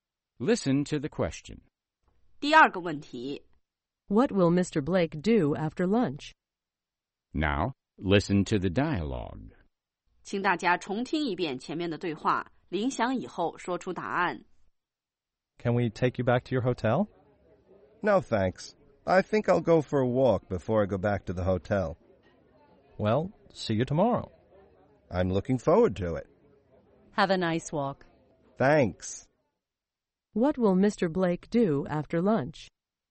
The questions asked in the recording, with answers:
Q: What will Mr. Blake do after lunch?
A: He'll go for a walk.